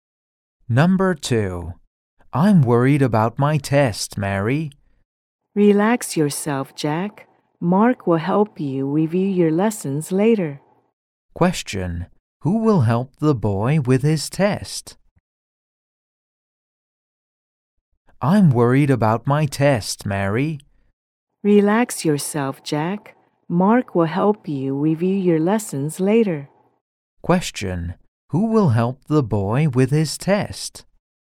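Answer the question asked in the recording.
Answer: Mark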